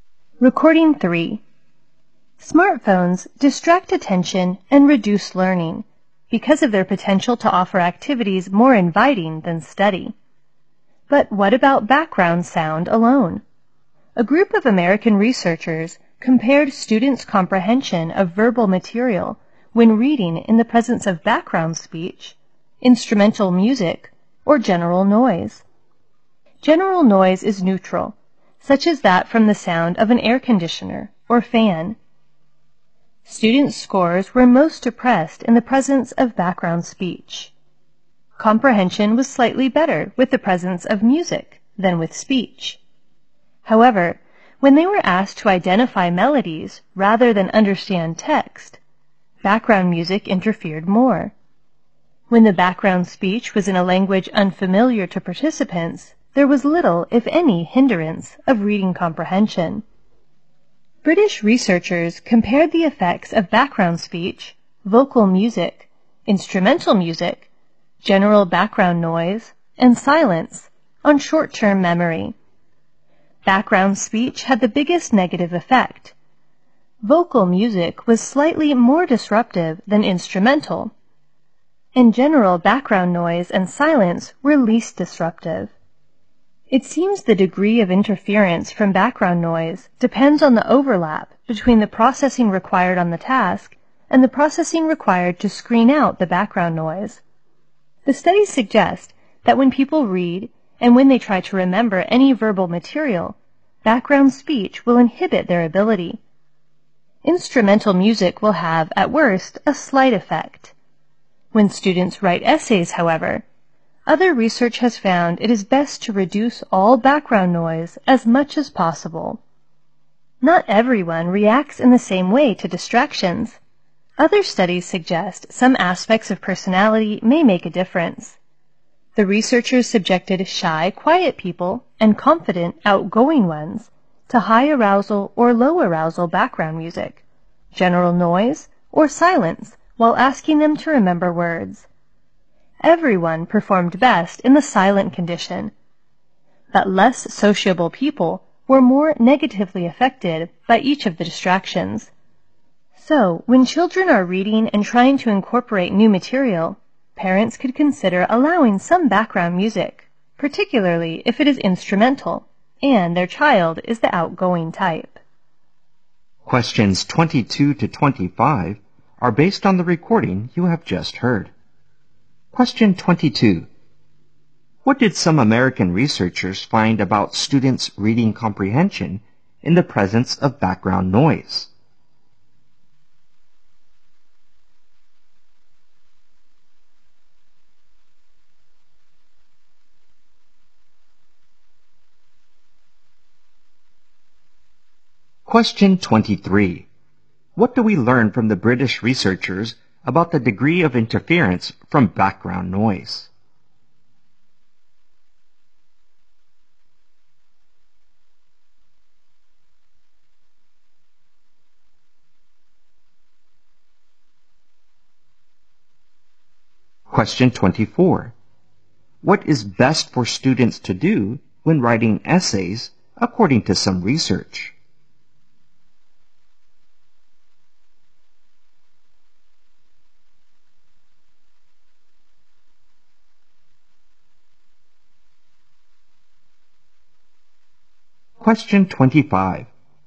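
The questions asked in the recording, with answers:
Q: What did some American researchers find about students' reading comprehension in the presence of background noise?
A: Scores were lowest with background speech.

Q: What do we learn from the British researchers about the degree of interference from background noise?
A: It depends on the overlap between the processing the task needs and the processing needed to screen out the noise.

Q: What is best for students to do when writing essays according to some research?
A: Reduce all background noise as much as possible.

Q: How do people of different personalities react to distractions according to other studies?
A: Less sociable people are more negatively affected by distractions.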